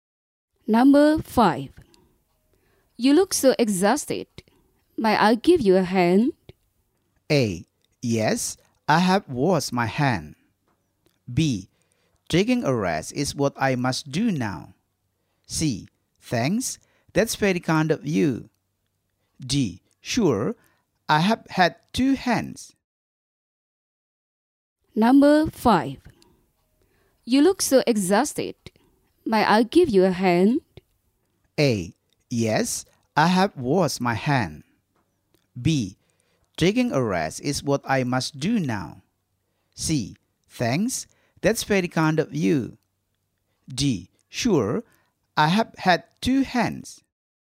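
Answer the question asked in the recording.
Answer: C: Thanks, that's very kind of you.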